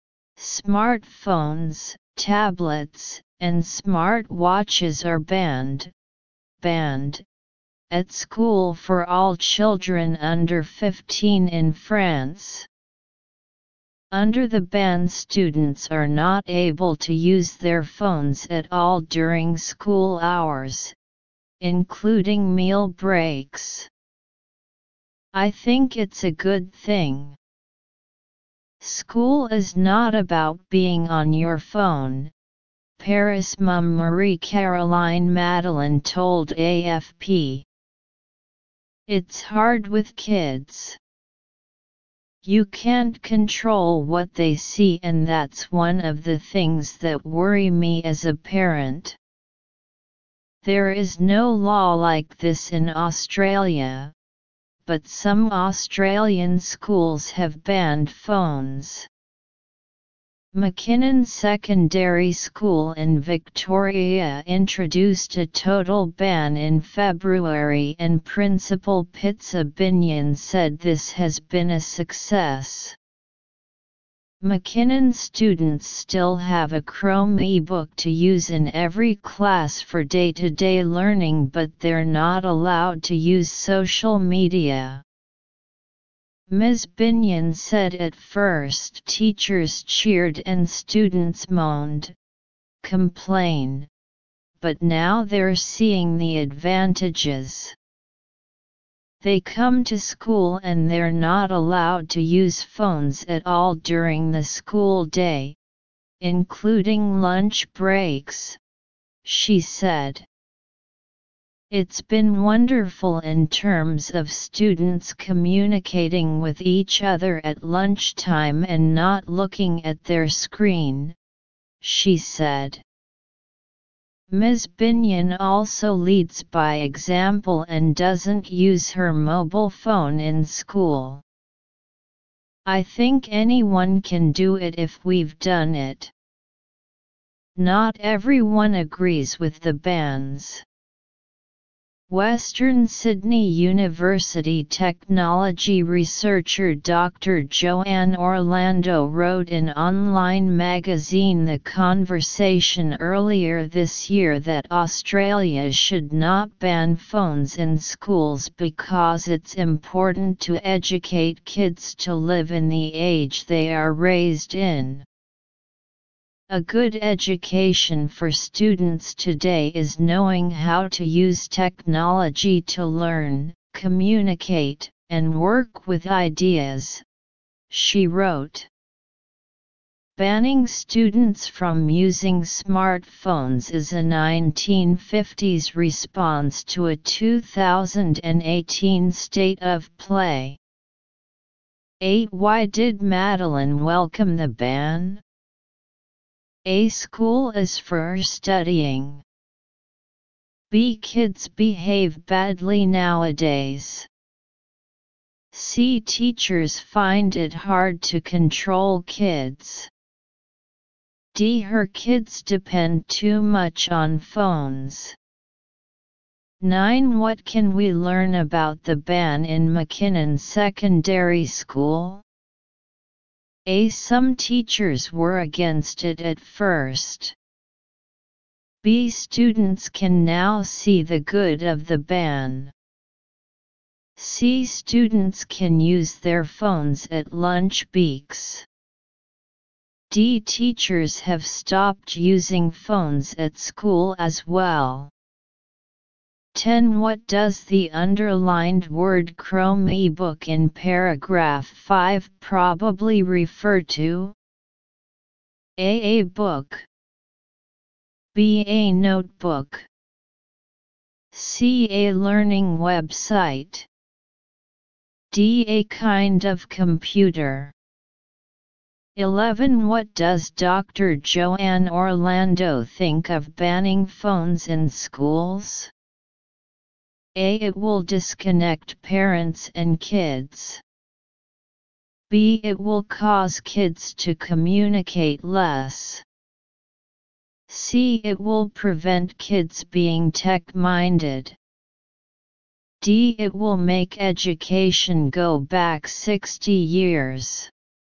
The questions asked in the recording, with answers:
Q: Why did Madeline welcome the ban?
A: 8. A.

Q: What can we learn about the ban in McKinnon Secondary School?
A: 9. B.

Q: What does the underlined word Chrome ebook in paragraph 5 probably refer to?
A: 10. D.

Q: What does Dr. Joanne Orlando think of banning phones in schools?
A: 11. C.